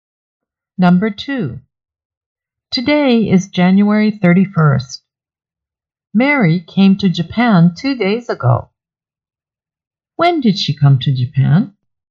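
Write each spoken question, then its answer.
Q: When did she come to Japan?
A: January 29th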